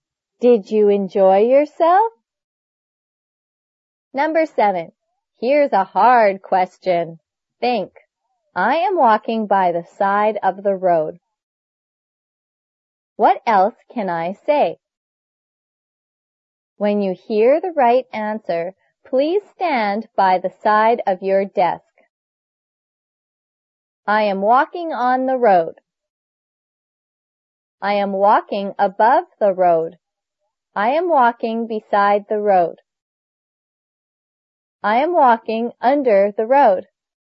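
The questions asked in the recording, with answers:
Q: What else can I say?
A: I am walking beside the road.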